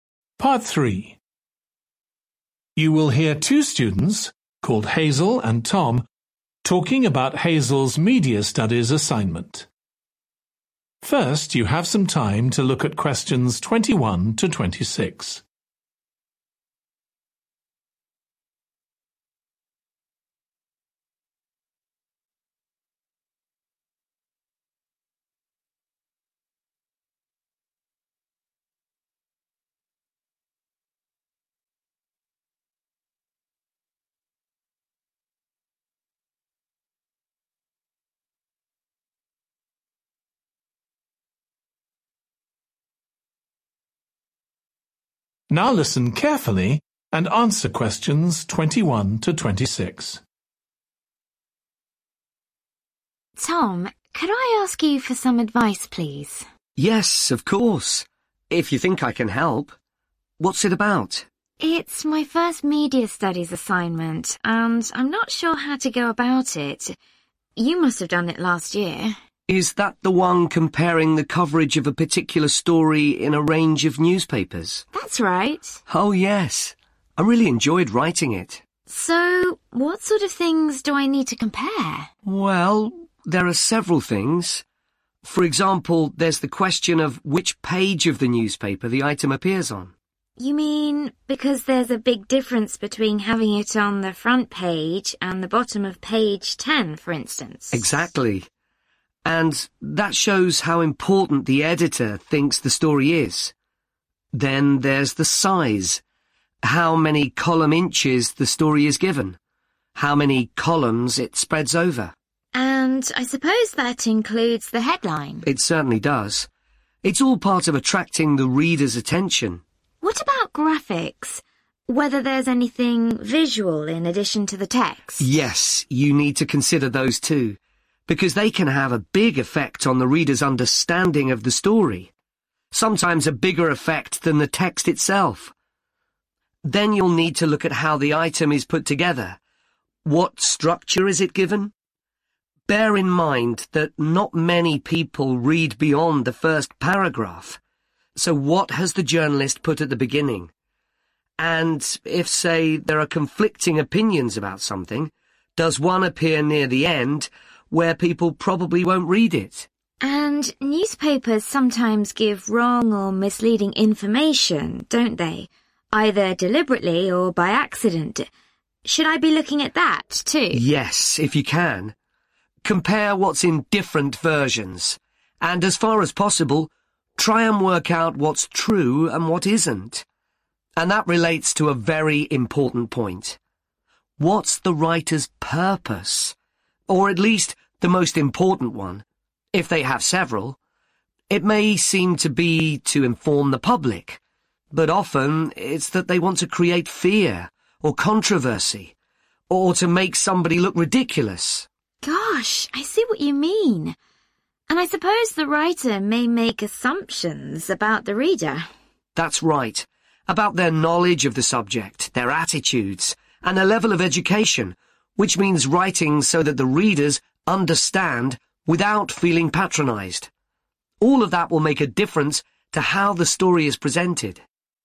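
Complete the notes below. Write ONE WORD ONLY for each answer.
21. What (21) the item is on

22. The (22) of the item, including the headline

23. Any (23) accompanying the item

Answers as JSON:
{"21": "page", "22": "size", "23": "graphics"}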